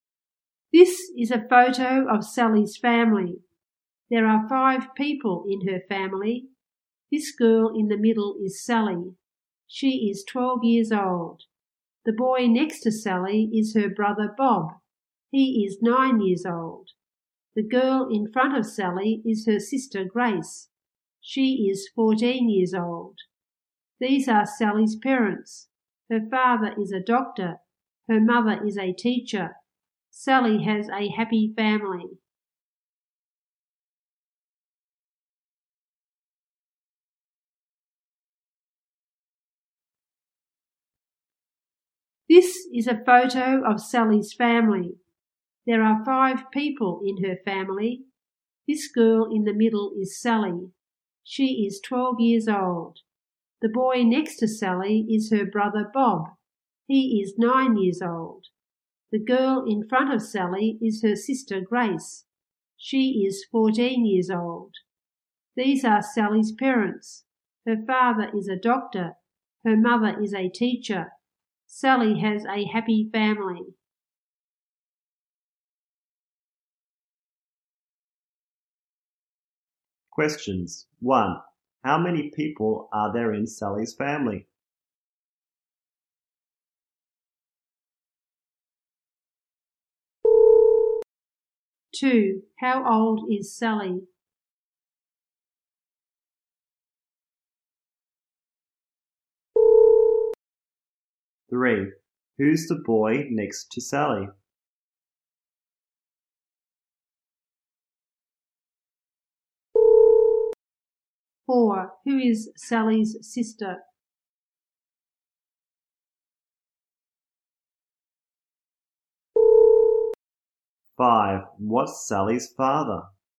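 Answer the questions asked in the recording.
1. Five
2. 12 years old
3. Her brother Bob
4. Grace
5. A doctor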